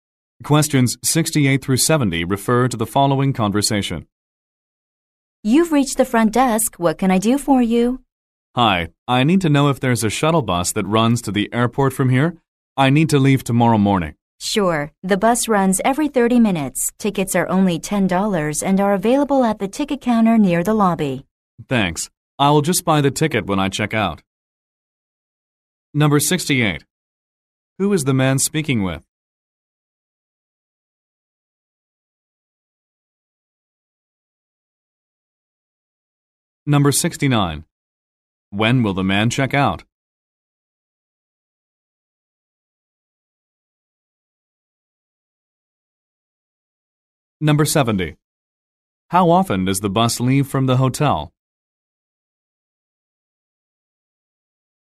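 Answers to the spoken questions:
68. A hotel front desk clerk
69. Tomorrow morning
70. Every 30 minutes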